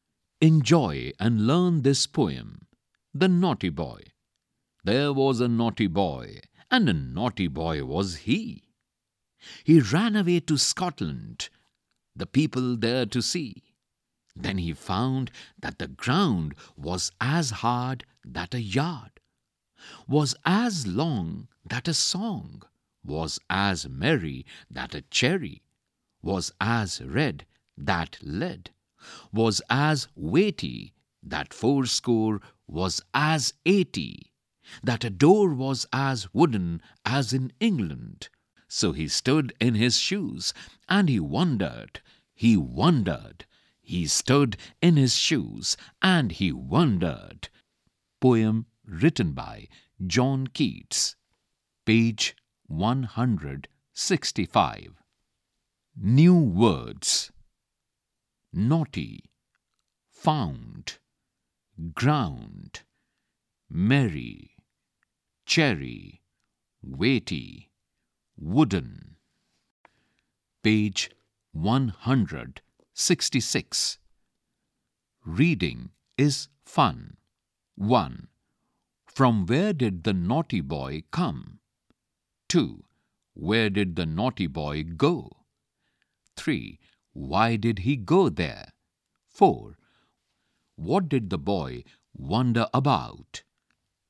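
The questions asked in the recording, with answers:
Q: Where did the naughty boy go?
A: Scotland

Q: Why did he go there?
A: To see the people there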